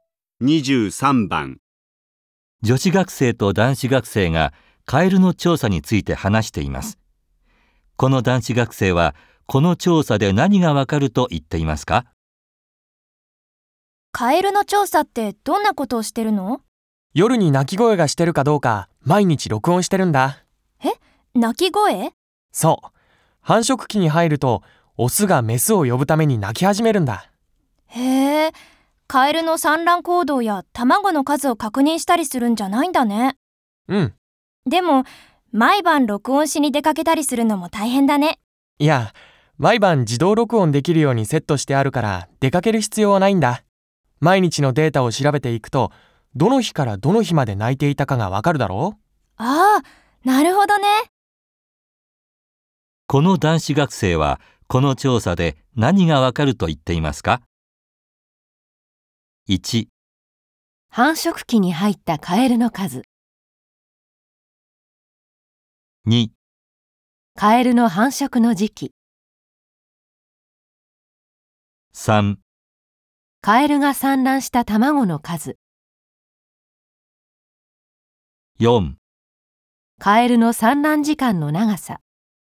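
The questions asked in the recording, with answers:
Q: この男子学生はこの調査で何がわかると言っていますか?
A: 2: カエルの繁殖の時期。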